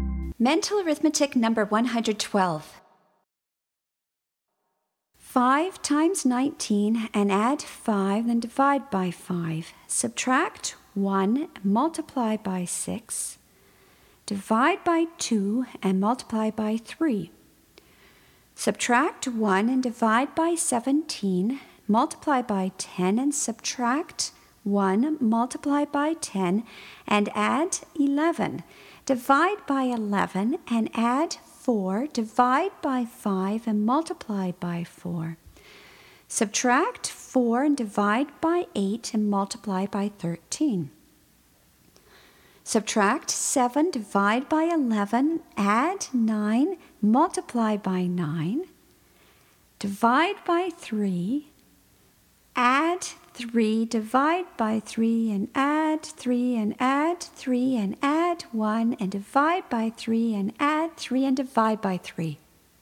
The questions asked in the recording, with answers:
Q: 5 times 19 and add 5, then divide by 5. Subtract 1, multiply by 6. Divide by 2 and multiply by 3. Subtract 1 and divide by 17. Multiply by 10 and subtract 1, multiply by 10, and add 11. Divide by 11 and add 4. Divide by 5 and multiply by 4. Subtract 4 and divide by 8 and multiply by 13. Subtract 7, divide by 11, add 9, multiply by 9. Divide by 3, add 3, divide by 3, and add 3, and add 3, and add 1, and divide by 3, and add 3, and divide by 3.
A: And the answer is 4.